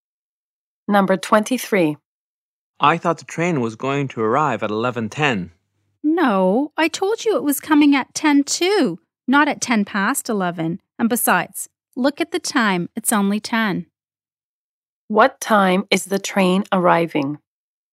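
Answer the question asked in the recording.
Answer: 10:02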